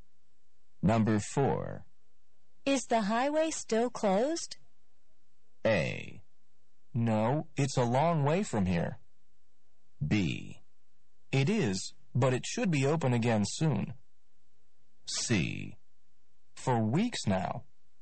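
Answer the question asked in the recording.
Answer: B: It is, but it should be open again soon.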